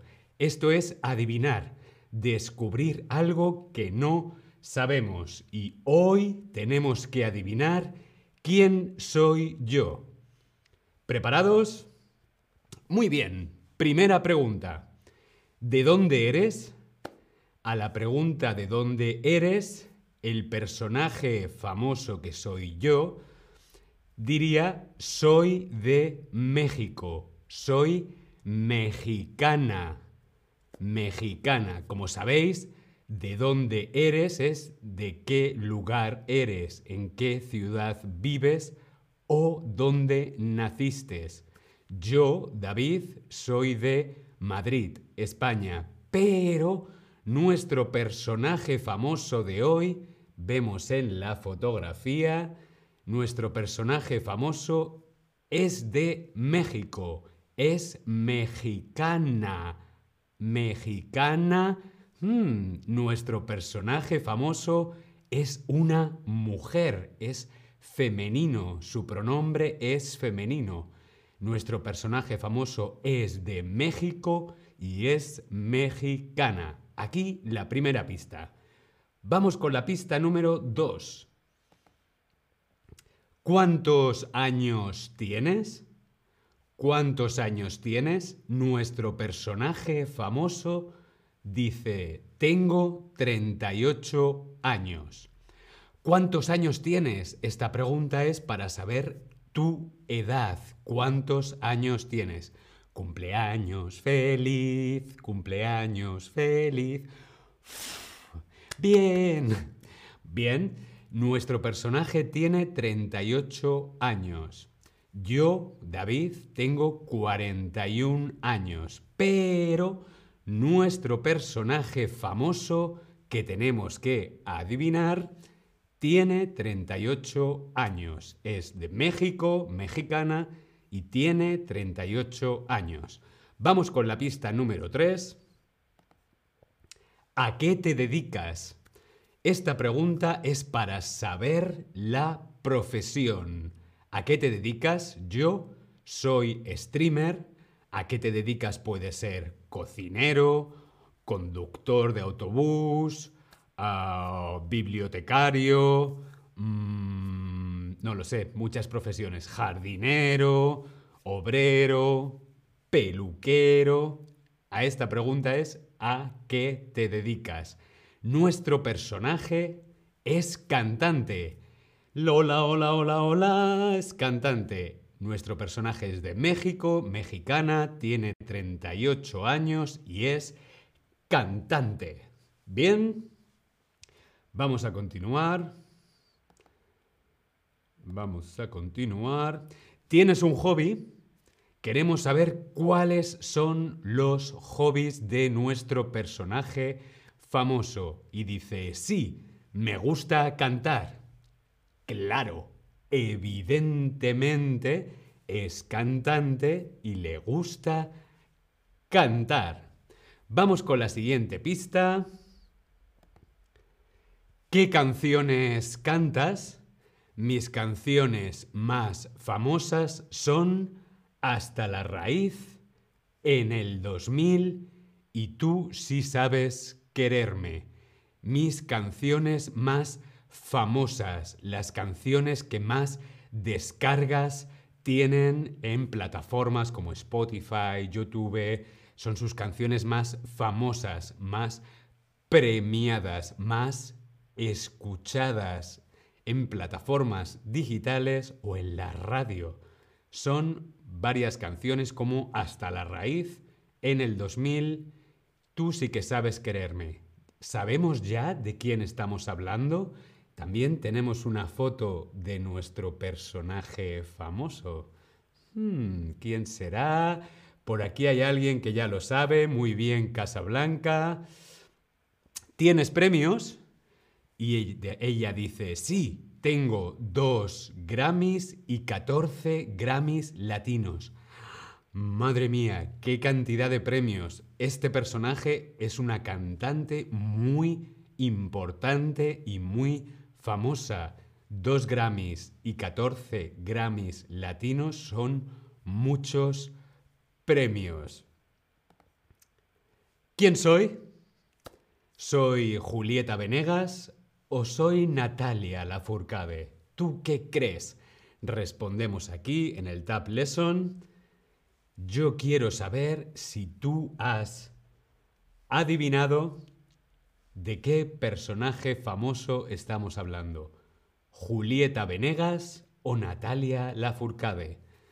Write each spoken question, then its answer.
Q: ¿Quién soy? Soy Julieta Venegas, o soy Natalia Lafourcade.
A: Correcto, Natalia La Furcade.